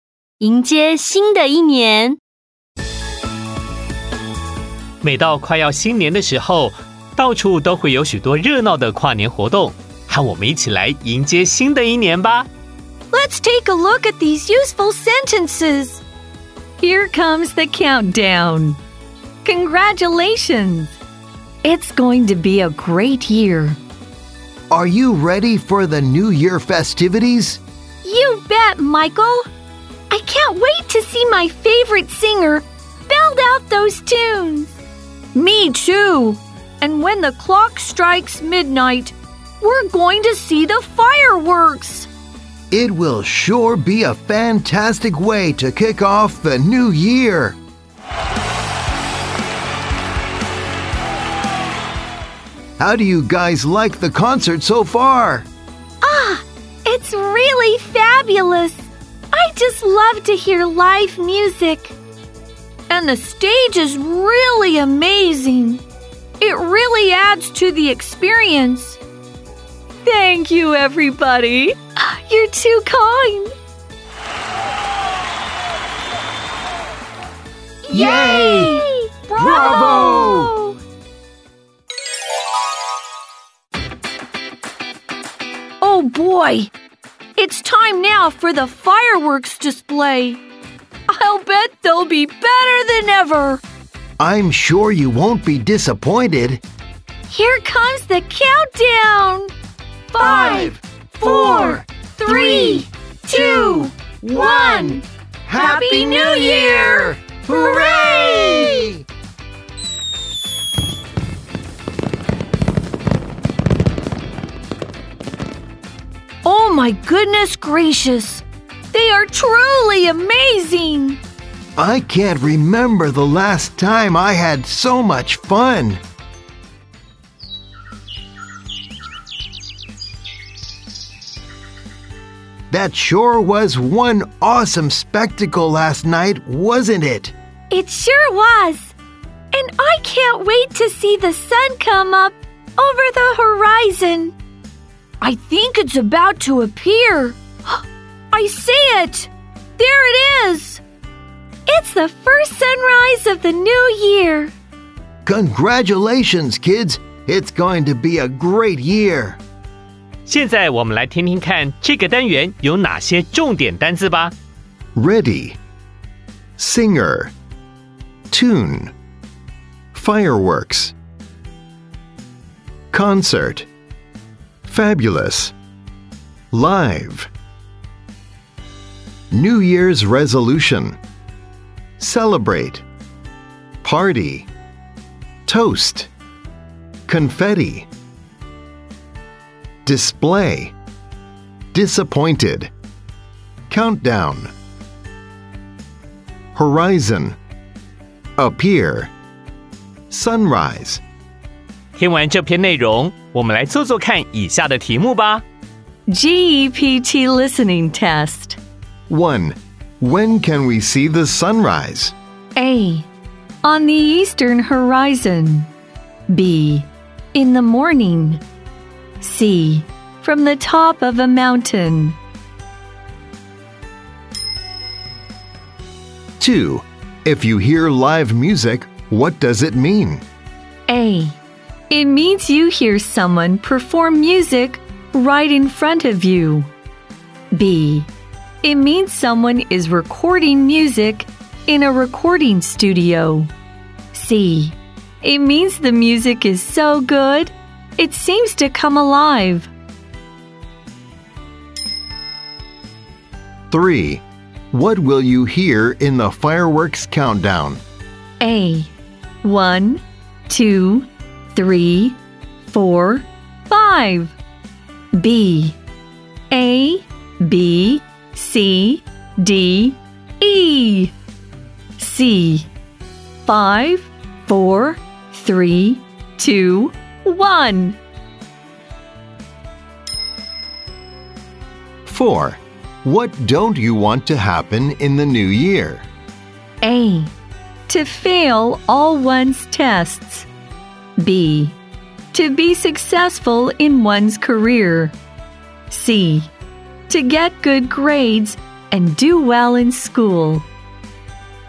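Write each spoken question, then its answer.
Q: When can we see the sunrise?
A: B: In the morning.

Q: If you hear live music, what does it mean?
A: A: It means you hear someone perform music right in front of you.

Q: What will you hear in the fireworks countdown?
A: C: 5, 4, 3, 2, 1.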